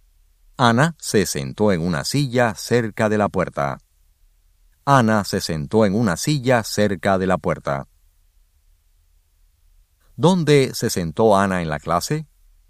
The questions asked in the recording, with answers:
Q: ¿Dónde se sentó Ana en la clase?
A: Ana se sentó en una silla cerca de la puerta.